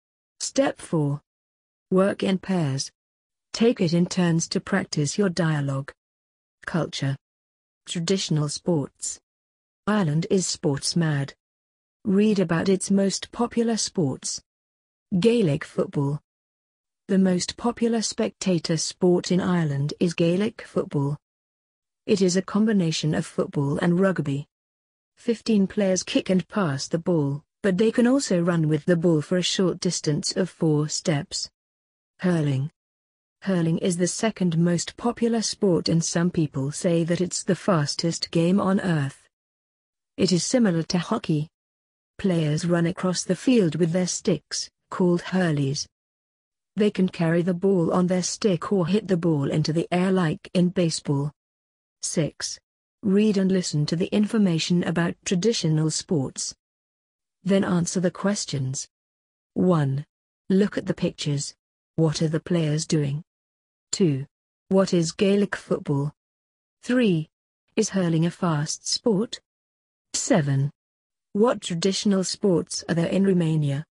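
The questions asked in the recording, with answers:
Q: What is Gaelic football?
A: A combination of football and rugby; the most popular spectator sport in Ireland

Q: Is hurling a fast sport?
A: Yes, some people say it's the fastest game on earth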